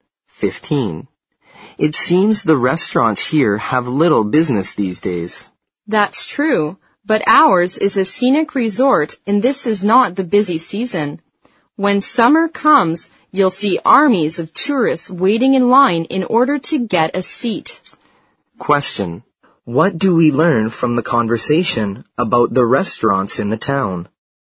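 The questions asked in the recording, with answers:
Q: What do we learn from the conversation about the restaurants in the town?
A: They have little business now but are crowded in summer, the busy tourist season.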